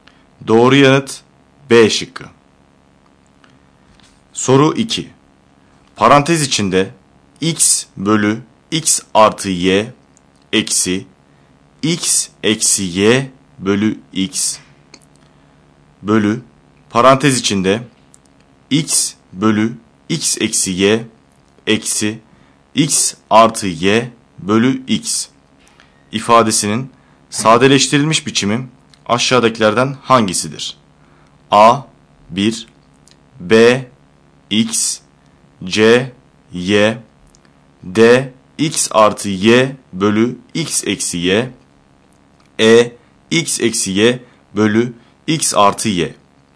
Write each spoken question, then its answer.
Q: Parantez içinde x bölü x artı y eksi x eksi y bölü x bölü parantez içinde x bölü x eksi y eksi x artı y bölü x ifadesinin sadeleştirilmiş biçimi aşağıdakilerden hangisidir?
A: Doğru yanıt E şıkkı.